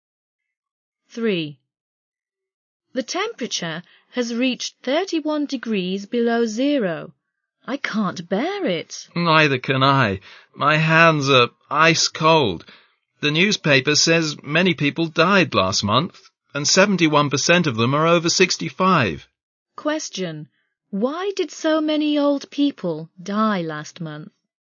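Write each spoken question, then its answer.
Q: Why did so many old people die last month?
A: Because of the extreme cold weather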